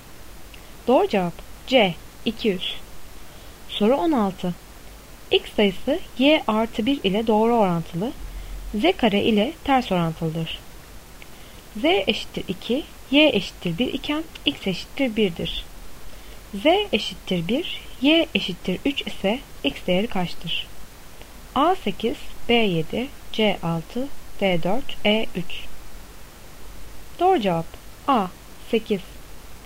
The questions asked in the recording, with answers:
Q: Z eşittir 1, Y eşittir 3 ise X değeri kaçtır?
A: Doğru cevap A 8.